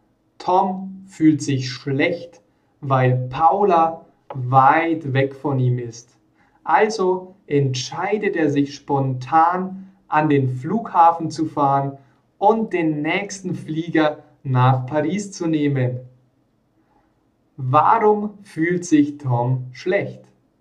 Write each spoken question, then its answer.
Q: Warum fühlt sich Tom schlecht?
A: Weil Paula weit, weit weg von ihm ist.